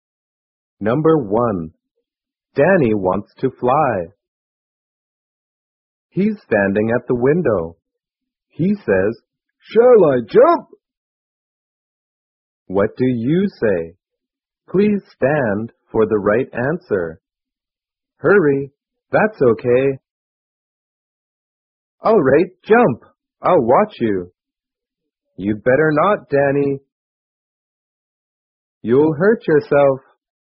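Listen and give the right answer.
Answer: You'd better not, Danny. You'll hurt yourself.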